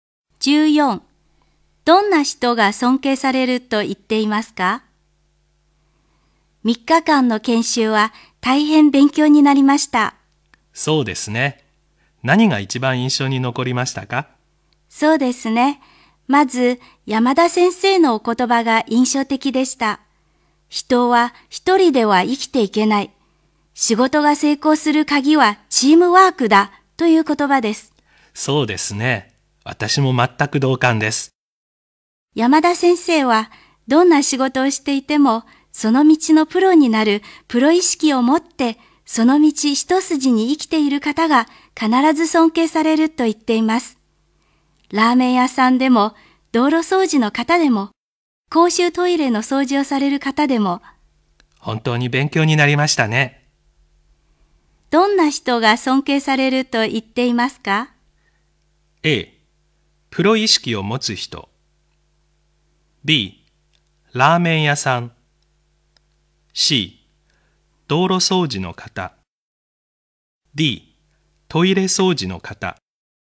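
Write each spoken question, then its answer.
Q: どんな人が尊敬されると言っていますか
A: A: プロ意識を持つ人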